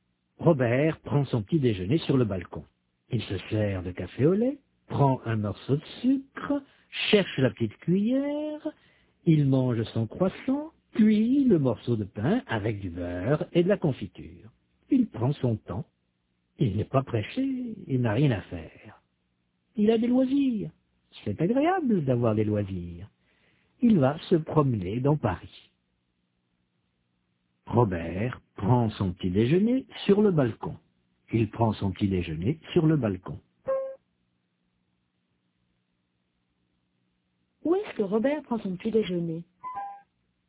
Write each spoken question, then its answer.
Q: Où est-ce que Robert prend son petit déjeuner ?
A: Sur le balcon.